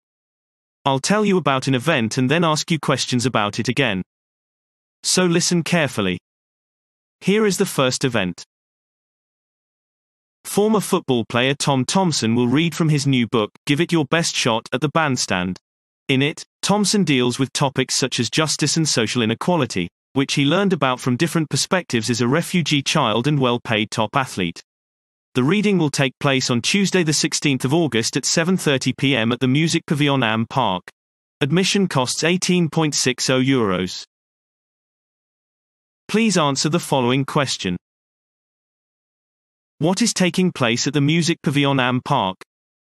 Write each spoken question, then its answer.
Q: What is taking place at the Music Pavilion Am Park?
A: Former football player Tom Thompson will read from his new book, Give It Your Best Shot, at the bandstand, addressing issues of justice and social inequality.